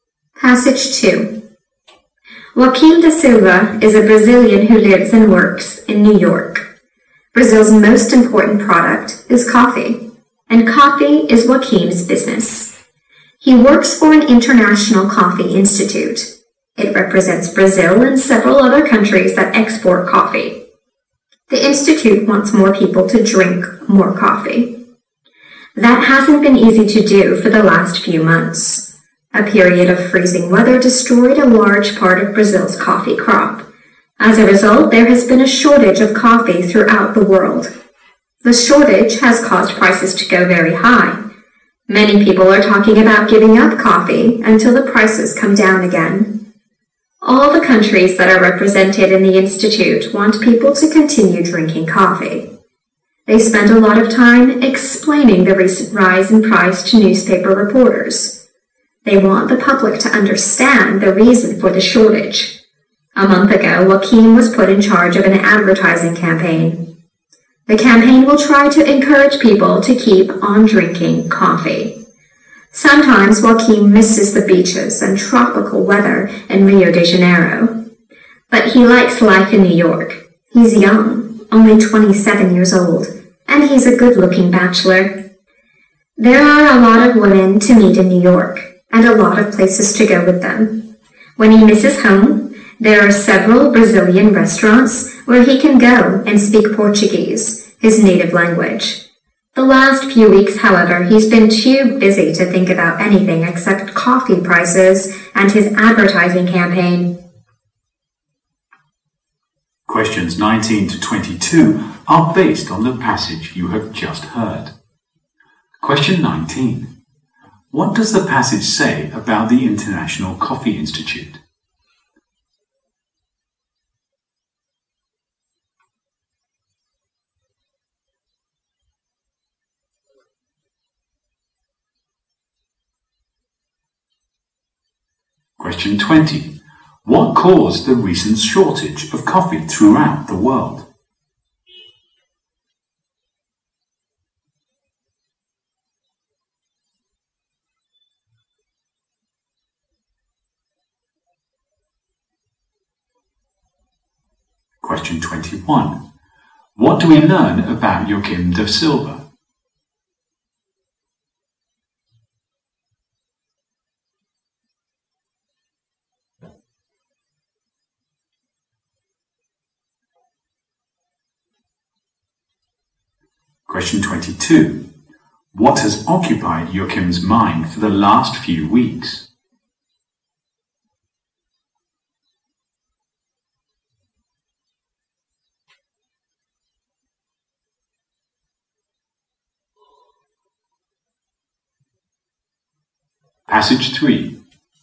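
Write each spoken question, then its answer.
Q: What does the passage say about the International Coffee Institute?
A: It represents Brazil and other coffee-exporting countries and wants people to drink more coffee.

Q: What caused the recent shortage of coffee throughout the world?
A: Freezing weather destroyed much of Brazil's coffee crop.

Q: What do we learn about Joaquim da Silva?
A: He is a young Brazilian bachelor who enjoys life in New York.

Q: What has occupied Joaquim's mind for the last few weeks?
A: Coffee prices and his advertising campaign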